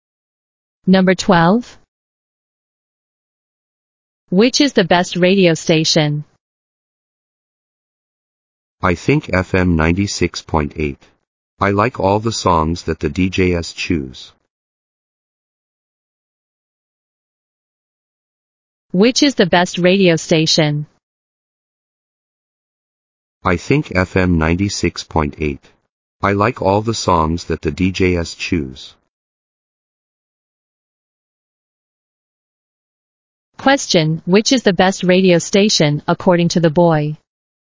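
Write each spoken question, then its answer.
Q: Question, which is the best radio station, according to the boy?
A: FM 96.8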